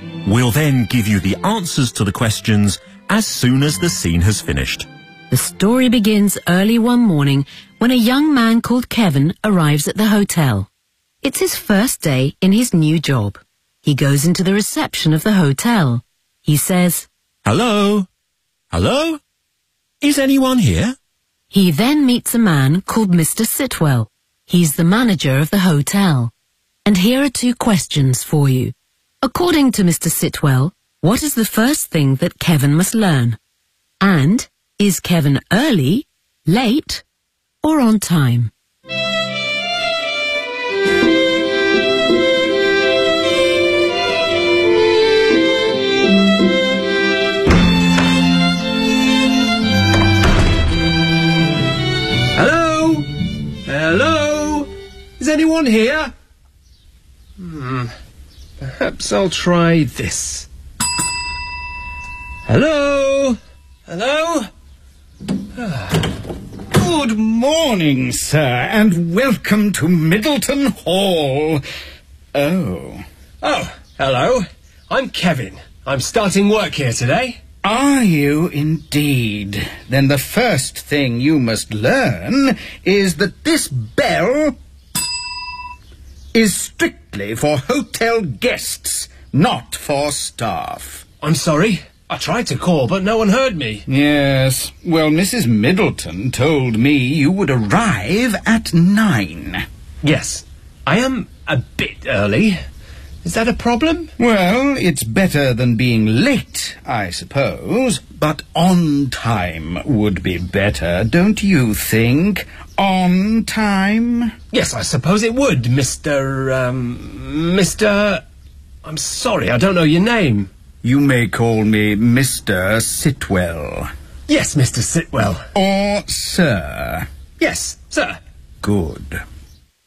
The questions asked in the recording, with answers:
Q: And is Kevin early, late, or on time?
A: I'm a bit early. Is that a problem?